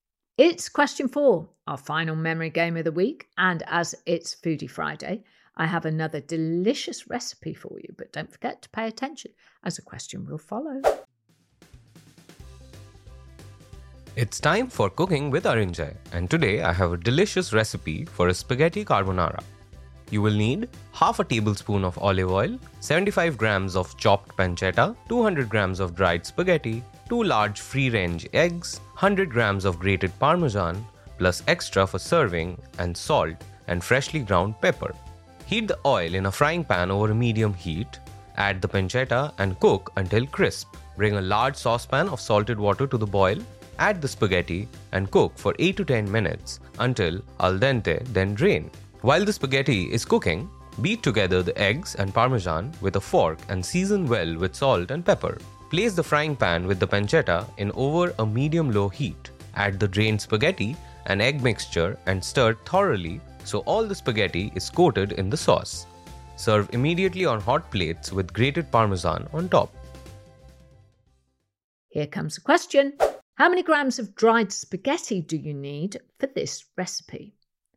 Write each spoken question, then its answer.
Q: How many grams of dried spaghetti do you need for this recipe?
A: And the answer is 200 grams.